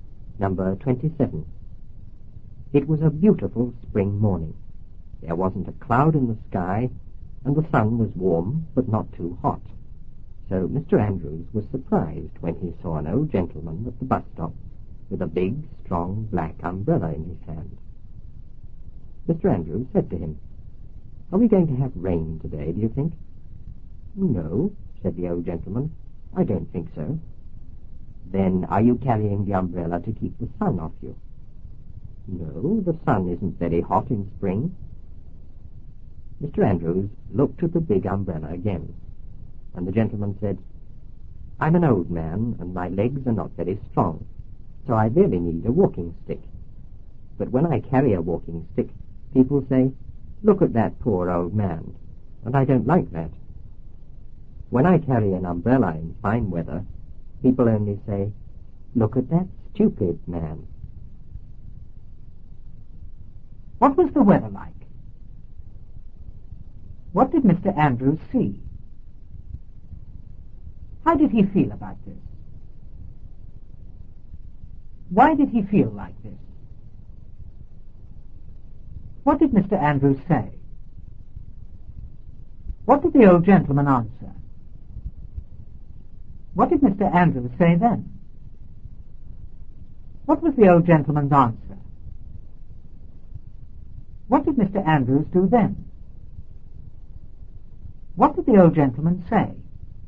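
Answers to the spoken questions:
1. A beautiful, sunny spring morning, warm but not too hot, with no clouds
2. An old gentleman at the bus stop holding a big black umbrella
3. Surprised
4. Because it was fine weather with no sign of rain
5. He asked if they were going to have rain today
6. No, he didn't think so
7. He asked if he was carrying the umbrella to keep the sun off
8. No, the sun isn't very hot in spring
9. He looked at the big umbrella again
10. He needed a walking stick but didn't want people to call him a poor old man, so he carried an umbrella instead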